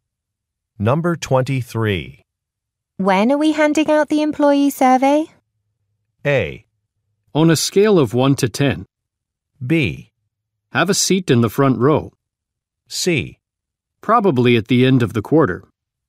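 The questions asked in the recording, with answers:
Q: When are we handing out the employee survey?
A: C: Probably at the end of the quarter.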